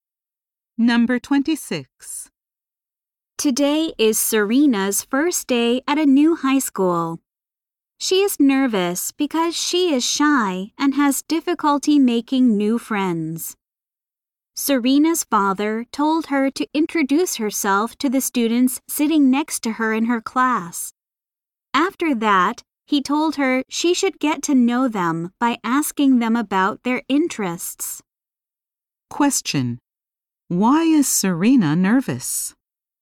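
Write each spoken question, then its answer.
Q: Why is Serena nervous?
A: She is shy and has trouble making new friends at her new school.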